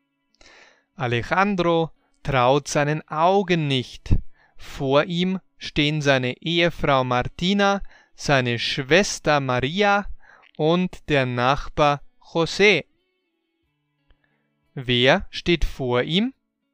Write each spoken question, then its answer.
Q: Wer steht vor ihm?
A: Seine Ehefrau Martina, seine Schwester Maria und der Nachbar José.